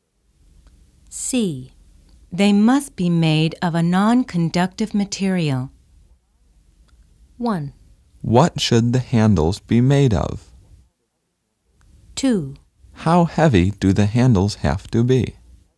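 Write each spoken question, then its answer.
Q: They must be made of a non-conductive material.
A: 1: What should the handles be made of?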